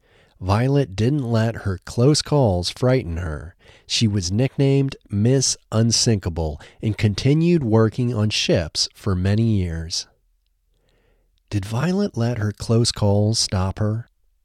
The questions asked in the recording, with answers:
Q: Did Violet let her close calls stop her?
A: No, Violet didn't let her close calls stop her.